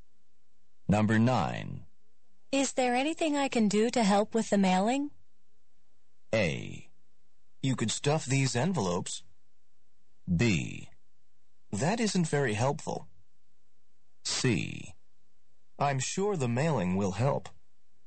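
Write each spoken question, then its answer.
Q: Is there anything I can do to help with the mailing?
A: A: You could stuff these envelopes.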